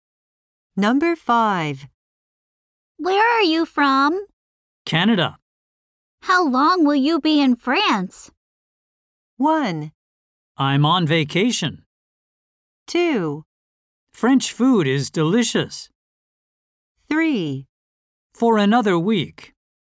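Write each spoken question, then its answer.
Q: How long will you be in France?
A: 3: For another week.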